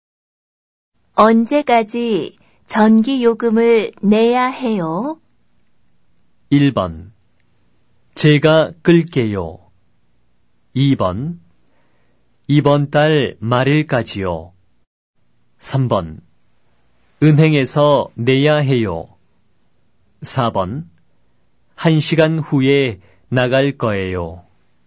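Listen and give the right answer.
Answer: 2: 이번 달 말일까지요.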